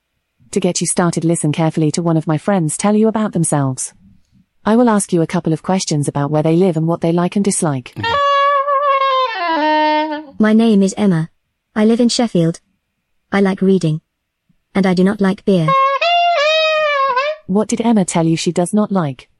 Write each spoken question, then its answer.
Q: What did Emma tell you she does not like?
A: Beer.